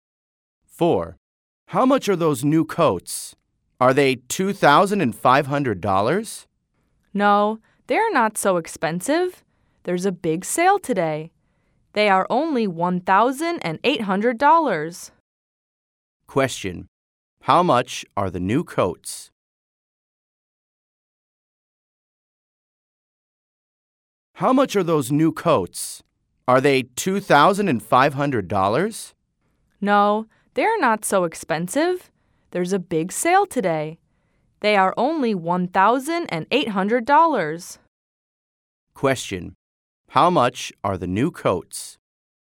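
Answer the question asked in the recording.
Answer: $1,800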